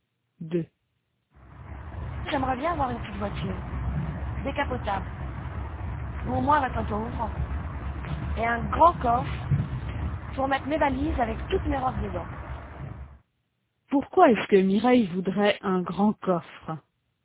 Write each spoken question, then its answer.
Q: Pourquoi est-ce que Mireille voudrait un grand coffre?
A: Pour mettre ses valises avec toutes ses robes dedans.